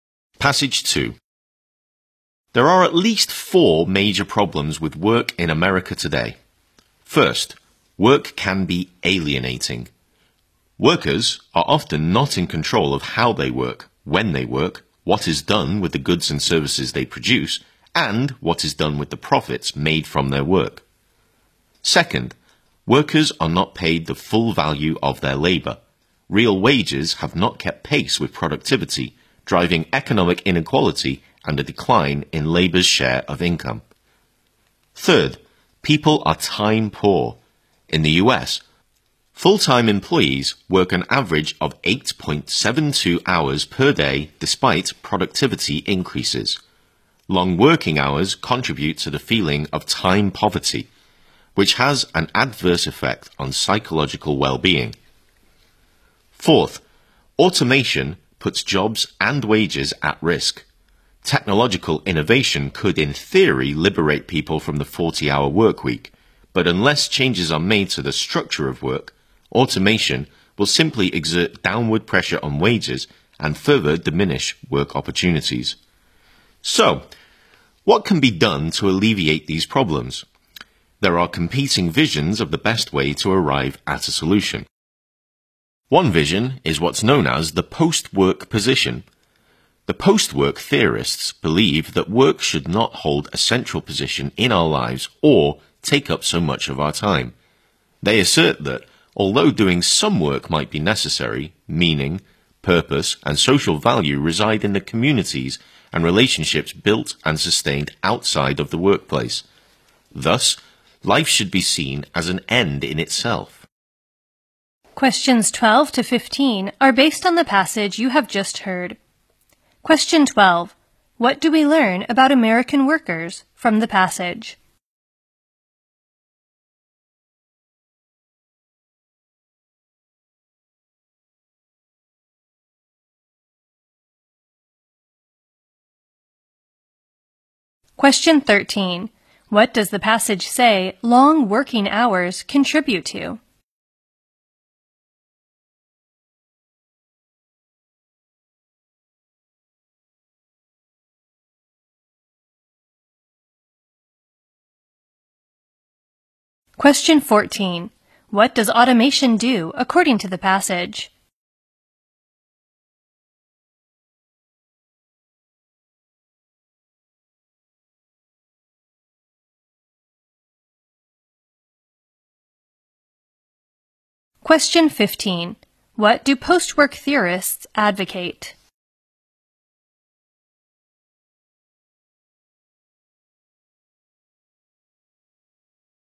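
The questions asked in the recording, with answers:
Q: What does the passage say long working hours contribute to?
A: The feeling of time poverty.

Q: What does automation do according to the passage?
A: It puts jobs and wages at risk.

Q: What do post-work theorists advocate?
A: That work should not hold a central position in our lives.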